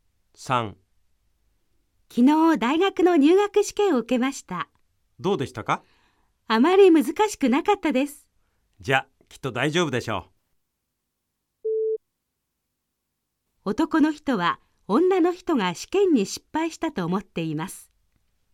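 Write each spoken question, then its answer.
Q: 男の人は女の人が試験に失敗したと思っています。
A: ×(正しくない)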